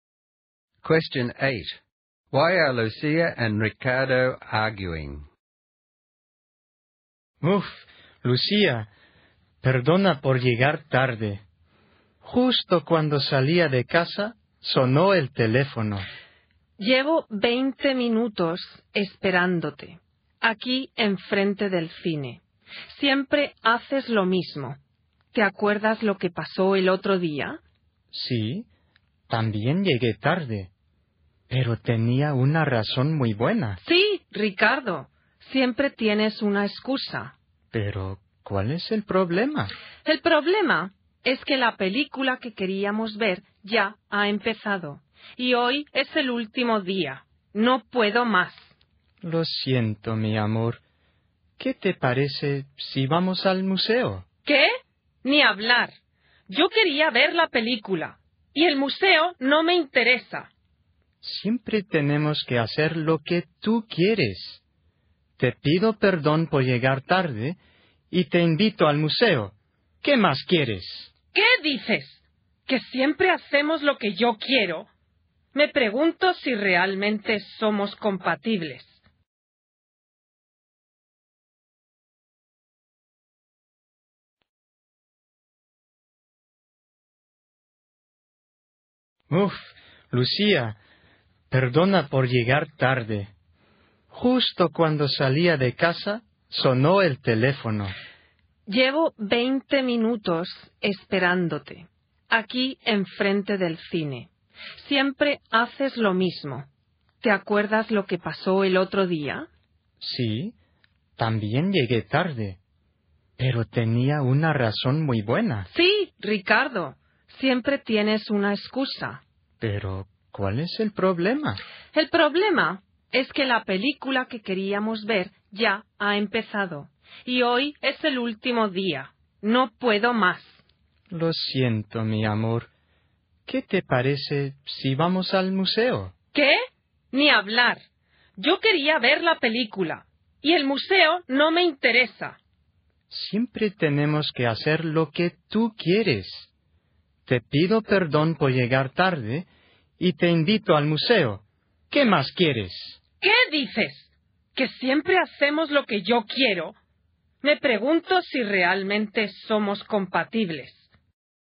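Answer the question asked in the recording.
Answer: Ricardo is late again, so they've missed the film, which was on for the last day; Lucia doesn't want to go to the museum and feels they always do what he wants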